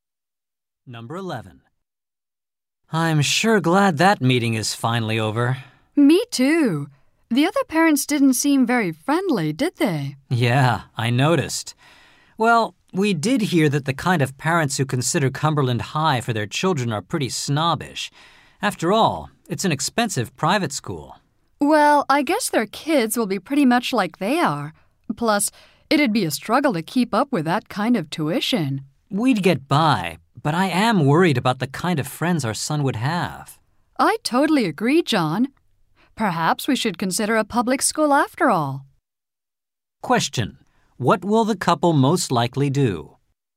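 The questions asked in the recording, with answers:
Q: What will the couple most likely do?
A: Consider sending their son to a public school.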